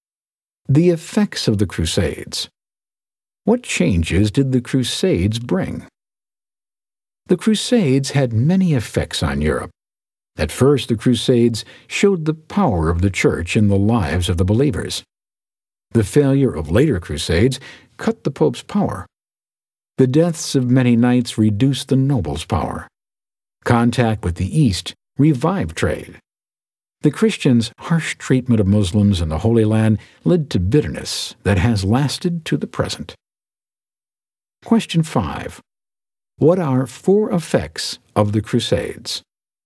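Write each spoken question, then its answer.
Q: What are four effects of the Crusades?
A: The pope's power was cut, the nobles' power was reduced, trade revived, and lasting bitterness with Muslims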